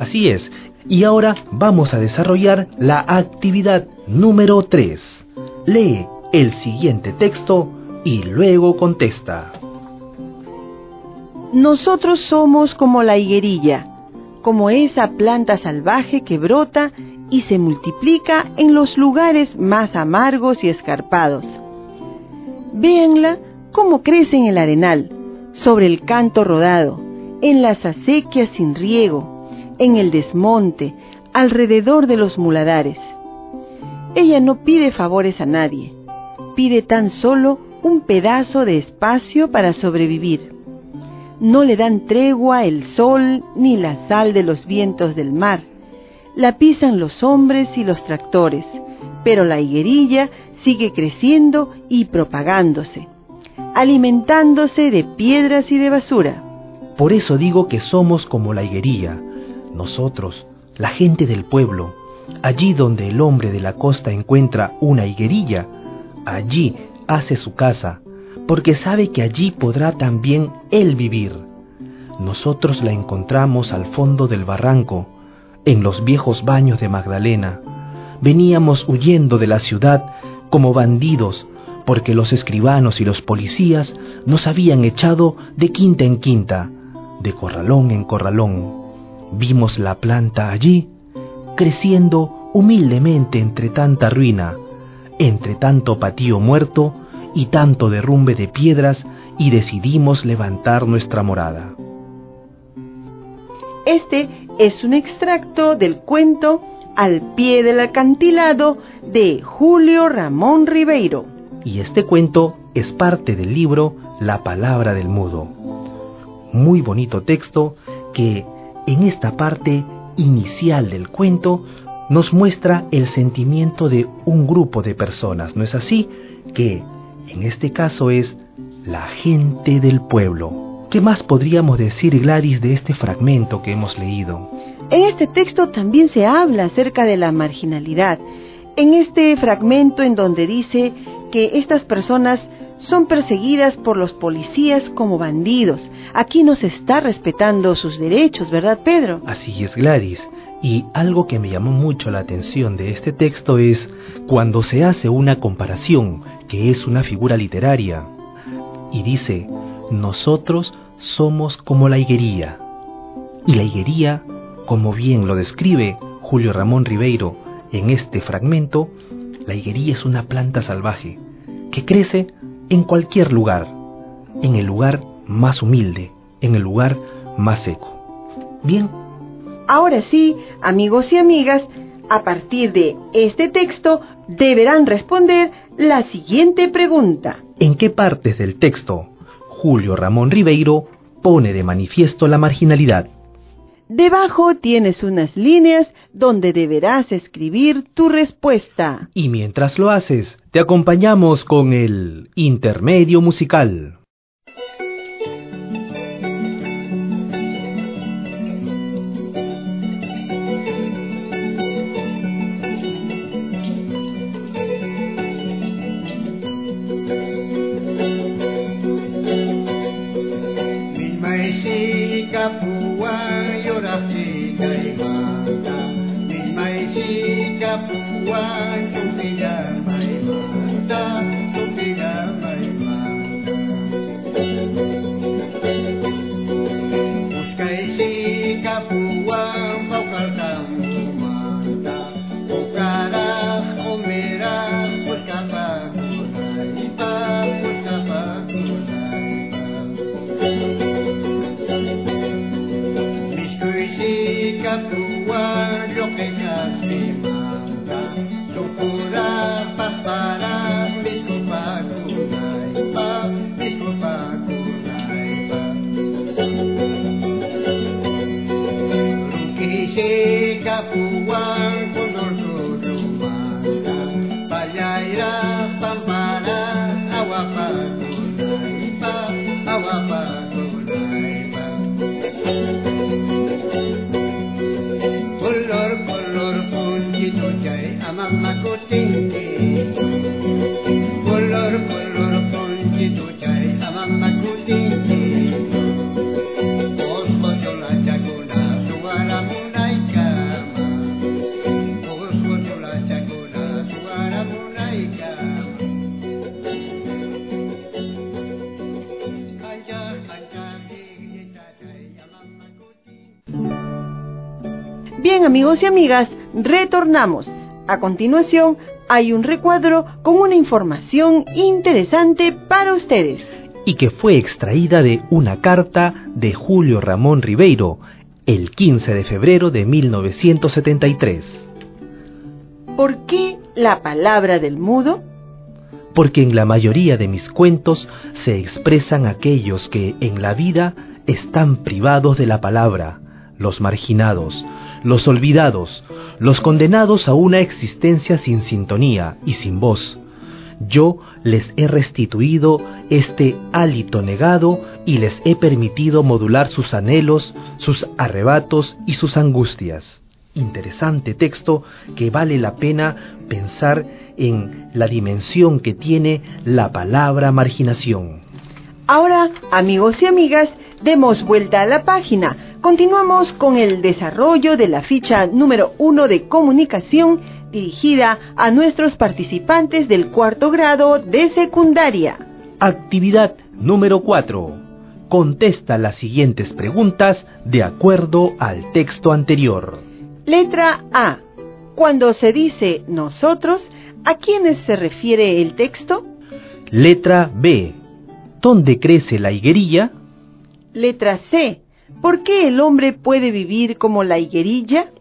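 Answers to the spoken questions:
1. Cuando dice que venían huyendo de la ciudad como bandidos, echados por escribanos y policías de quinta en quinta, y viven entre ruinas al pie del barranco
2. A la gente del pueblo
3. En los lugares más amargos y escarpados: el arenal, el canto rodado, las acequias sin riego, el desmonte, los muladares
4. Porque donde sobrevive la higuerilla, en lugares duros y pobres, el hombre sabe que él también podrá vivir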